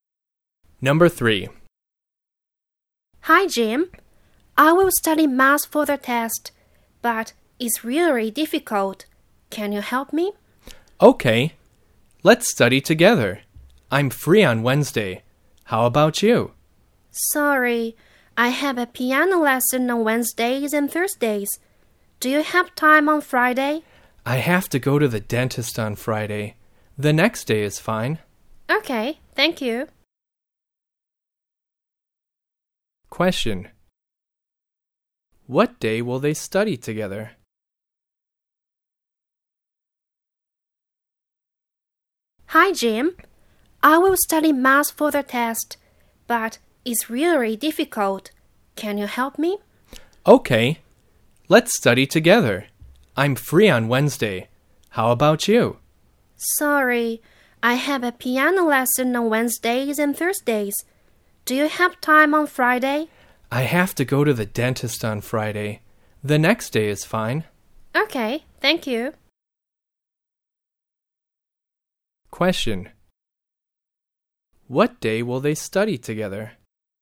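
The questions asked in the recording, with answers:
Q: What day will they study together?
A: Saturday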